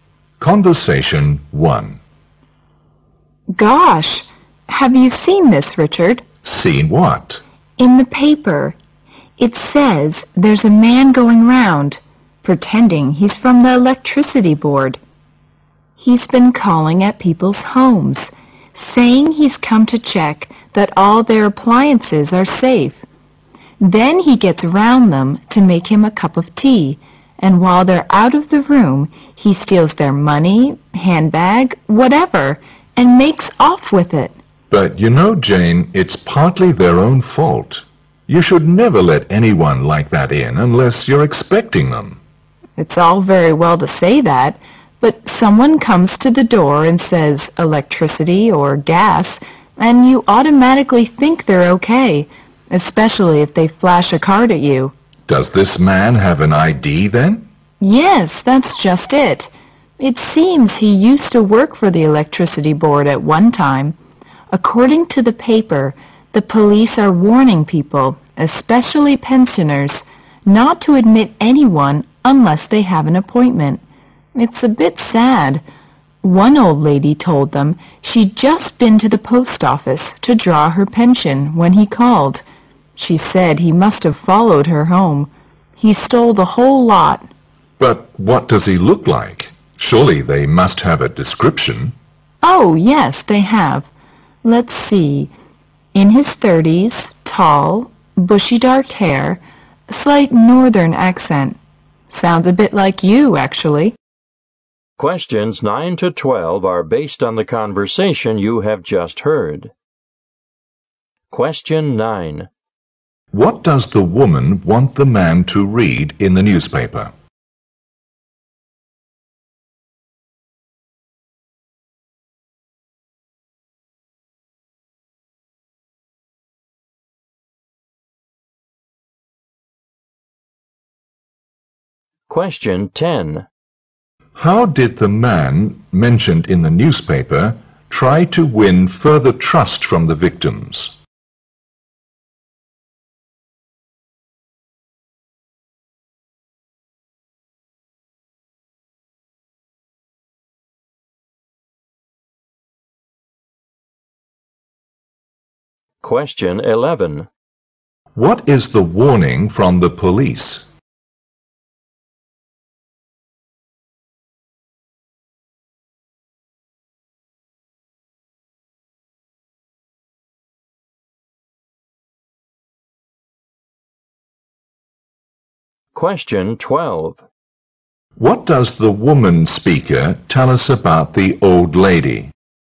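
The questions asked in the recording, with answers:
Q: What does the woman want the man to read in the newspaper?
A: A report about a man stealing from people's homes

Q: What is the warning from the police?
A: Don't let anyone in unless they have an appointment

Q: What does the woman speaker tell us about the old lady?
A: She had all her pension stolen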